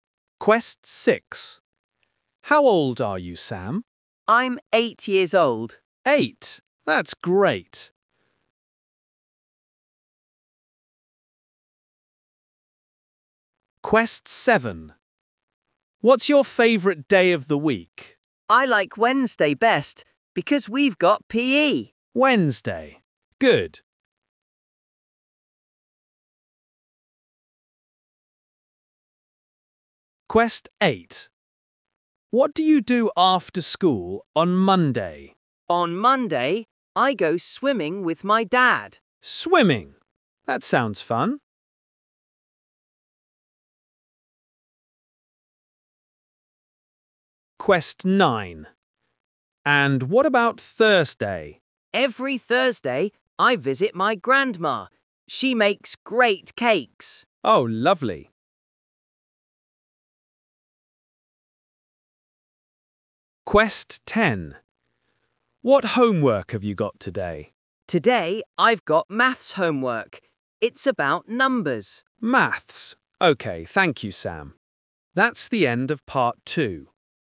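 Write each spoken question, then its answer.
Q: What's your favourite day of the week?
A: Wednesday

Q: What do you do after school on Monday?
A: swimming

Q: And what about Thursday?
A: visit his grandma

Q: What homework have you got today?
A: maths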